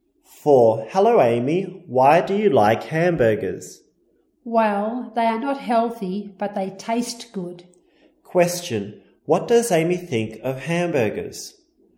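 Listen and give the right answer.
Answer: They are not healthy, but they taste good.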